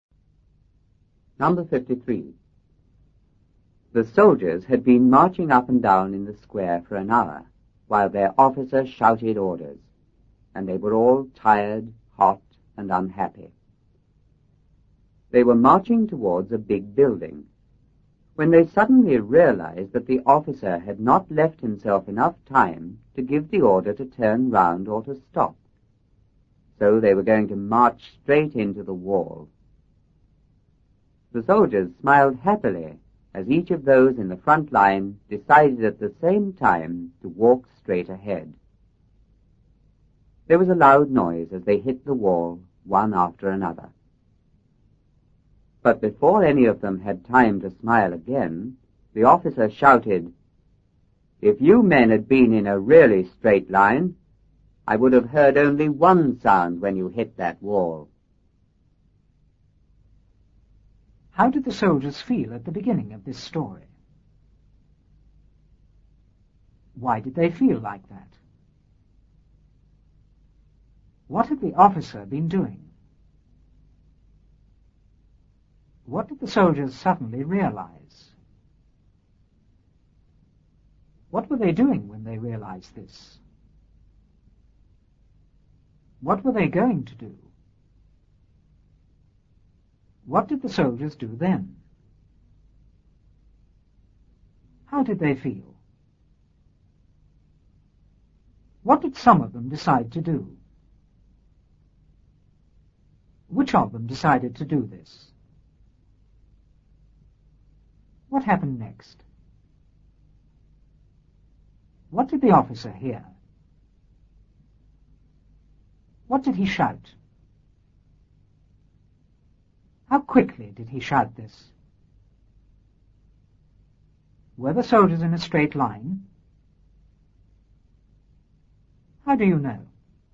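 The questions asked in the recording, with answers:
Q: How did the soldiers feel at the beginning of this story?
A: Tired, hot, and unhappy

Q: Why did they feel like that?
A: They had been marching up and down in the square for an hour

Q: What had the officer been doing?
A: Shouting orders

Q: What did the soldiers suddenly realize?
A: The officer had not left himself enough time to give the order to turn round or stop

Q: What were they doing when they realized this?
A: Marching towards a big building

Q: What were they going to do?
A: March straight into the wall

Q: What did the soldiers do then?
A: They smiled happily

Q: How did they feel?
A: Happy

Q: What did some of them decide to do?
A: Walk straight ahead

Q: Which of them decided to do this?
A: Those in the front line

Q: What happened next?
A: They hit the wall one after another with a loud noise

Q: What did the officer hear?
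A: A loud noise as they hit the wall one after another

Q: What did he shout?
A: If you men had been in a really straight line, I would have heard only one sound when you hit that wall

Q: How quickly did he shout this?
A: Before any of them had time to smile again

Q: Were the soldiers in a straight line? How do you know?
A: No, because they hit the wall one after another, not all at once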